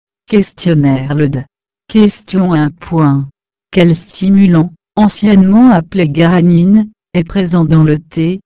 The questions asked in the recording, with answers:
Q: Quel stimulant, anciennement appelé granine, est présent dans le thé?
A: Réponse caféine.